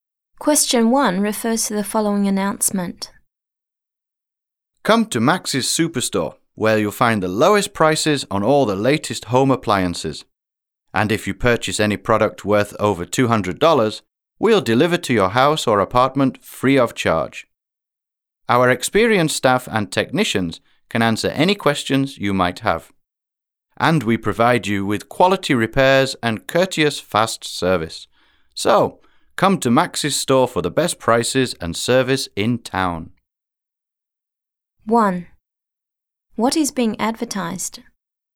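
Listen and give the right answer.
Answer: A store selling home appliances (Max's Superstore)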